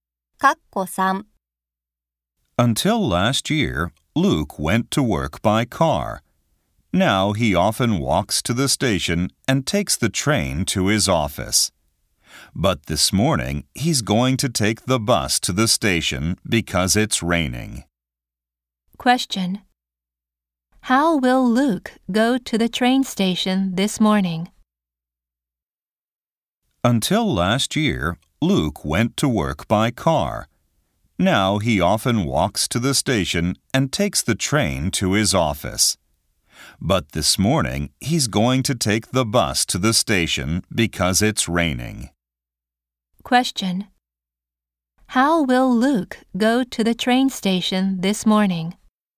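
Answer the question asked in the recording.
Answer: By bus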